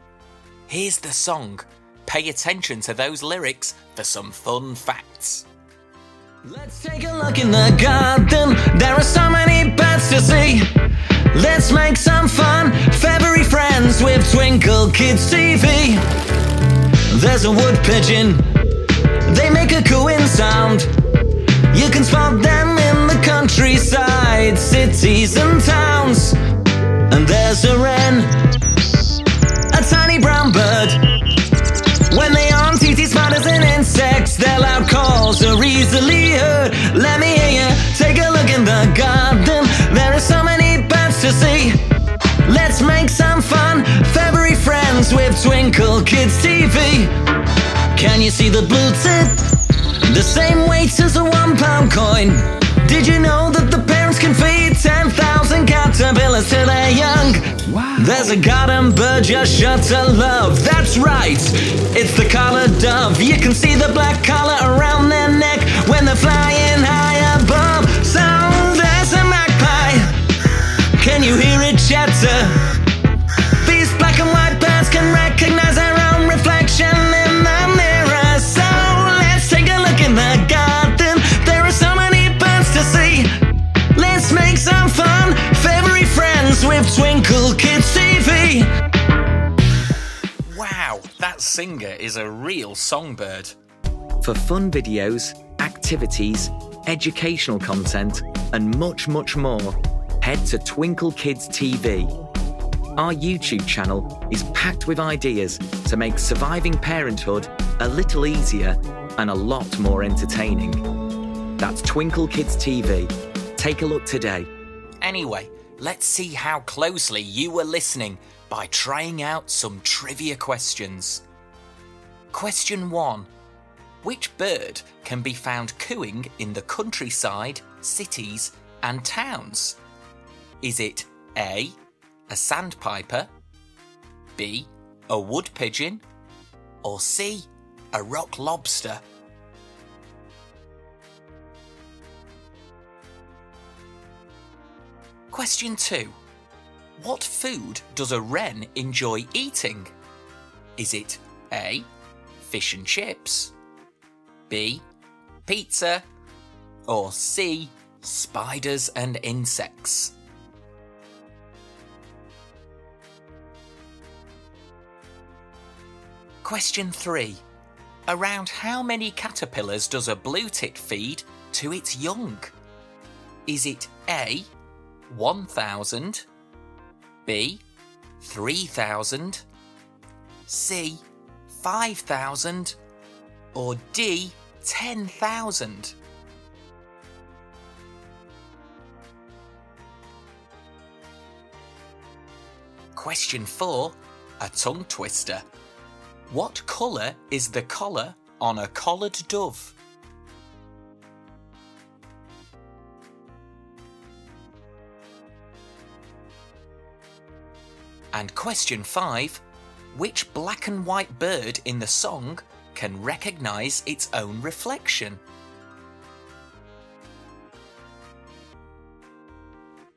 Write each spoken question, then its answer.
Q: Which bird can be found cooing in the countryside, cities, and towns?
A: The answer is B, a wood pigeon.

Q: What food does a wren enjoy eating?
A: the answer is C, spiders and insects.

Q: Around how many caterpillars does a blue tit feed to its young?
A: The answer is a massive 10,000 caterpillars.

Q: What colour is the collar on a collared dove?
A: The answer is black.

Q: Which black and white bird in the song can recognise its own reflection?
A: The answer is the magpie.